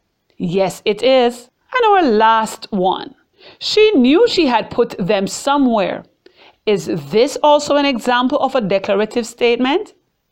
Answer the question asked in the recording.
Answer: Yes, it is an example of a declarative sentence.